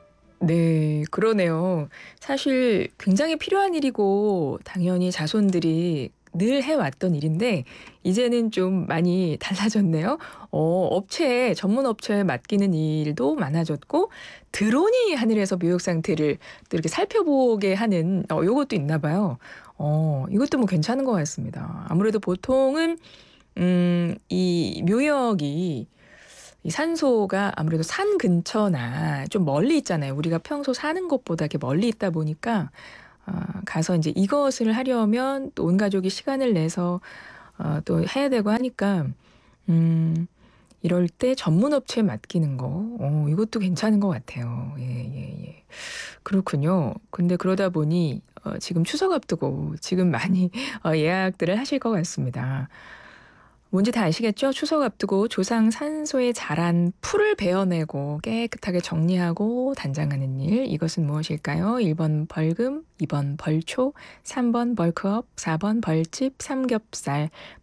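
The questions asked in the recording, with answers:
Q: 추석 앞두고 조상 산소에 자란 풀을 베어내고 깨끗하게 정리하고 단장하는 일. 이것은 무엇일까요? 1번 벌금, 2번 벌초, 3번 벌크업, 4번 벌집, 삼겹살.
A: 2: 벌초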